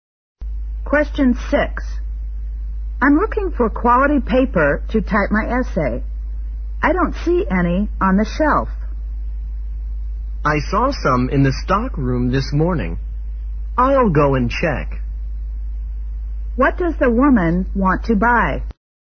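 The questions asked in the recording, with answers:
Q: What does the woman want to buy?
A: Quality paper to type her essay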